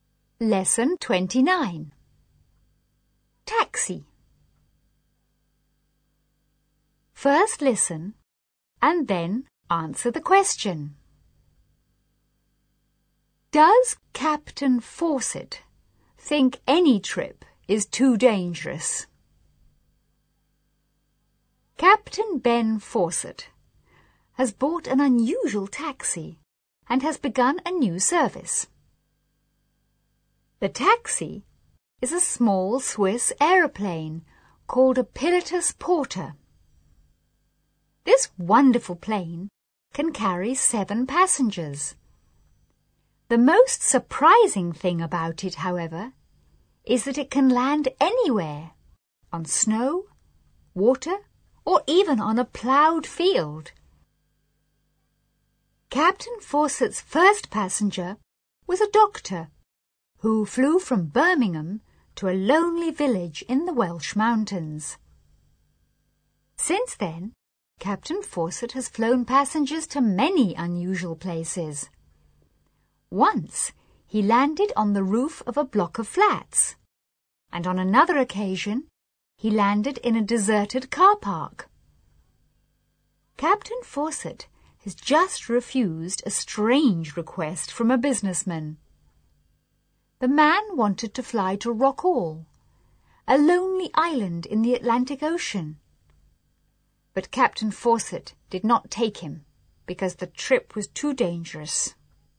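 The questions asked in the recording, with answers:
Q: Does Captain Fawcett think any trip is too dangerous?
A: Yes, he refused to fly a businessman to Rockall because the trip was too dangerous.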